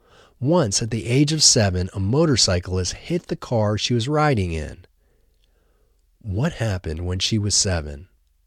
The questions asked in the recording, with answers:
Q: What happened when she was 7?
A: When she was 7, a motorcyclist hit the car she was riding in.